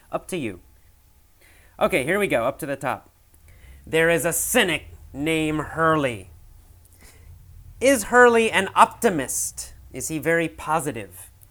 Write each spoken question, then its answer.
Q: Is Hurley an optimist? Is he very positive?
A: Well, no, Hurley is not positive.